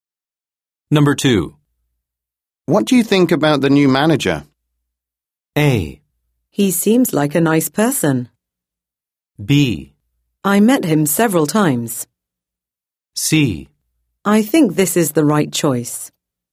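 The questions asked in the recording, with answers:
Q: What do you think about the new manager?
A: A: He seems like a nice person.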